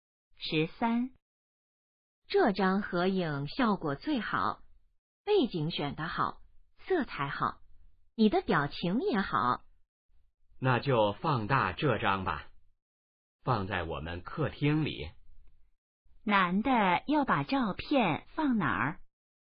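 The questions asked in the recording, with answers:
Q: 男的要把照片放哪儿?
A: 客厅里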